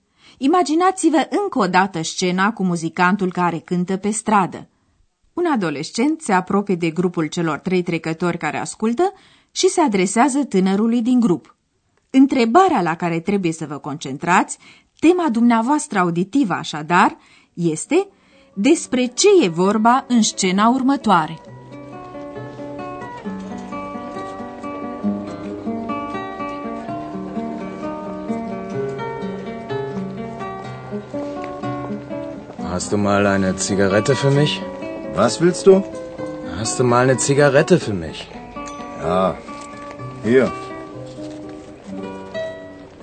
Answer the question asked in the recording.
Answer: Este vorba așadar de un tânăr care vrea o țigară.